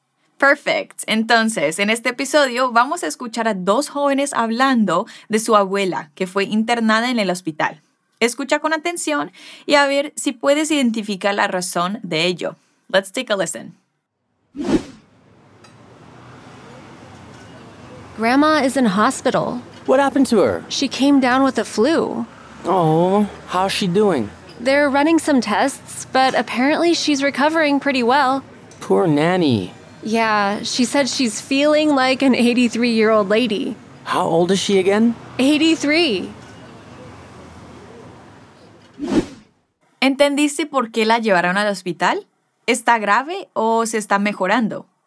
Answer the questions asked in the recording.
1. Amber le contesta, She came down with the flu.
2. Sin embargo, parece que la abuela se está recuperando bastante bien